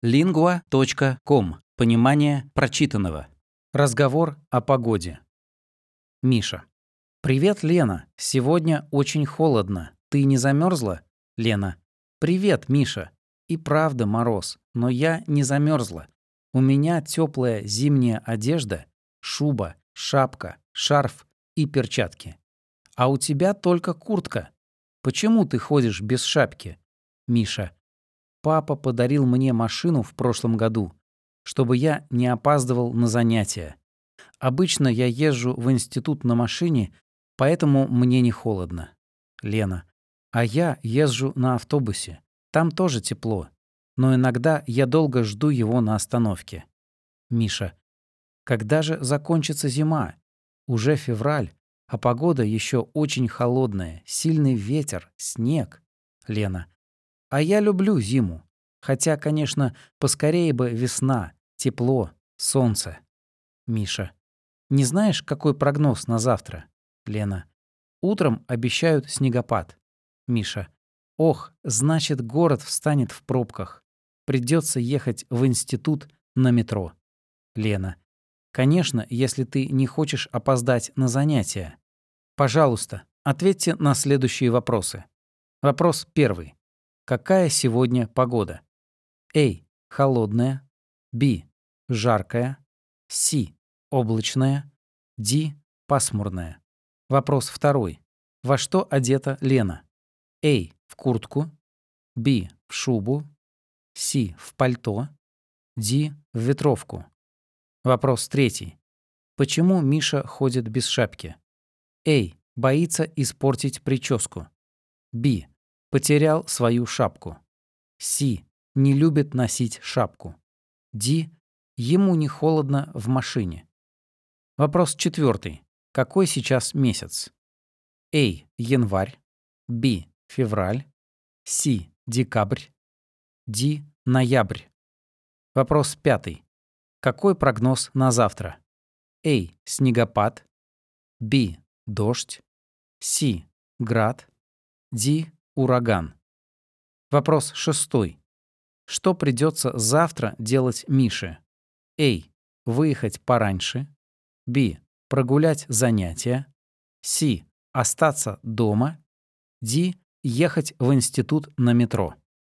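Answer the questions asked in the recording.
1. A: Холодная.
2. B: В шубу.
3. D: Ему не холодно в машине.
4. B: Февраль.
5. A: Снегопад.
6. D: Ехать в институт на метро.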